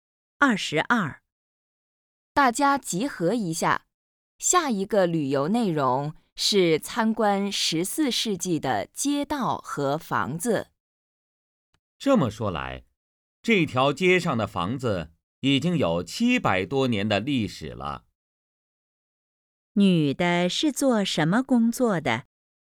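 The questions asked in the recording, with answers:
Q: 女的是做什么工作的?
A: 导游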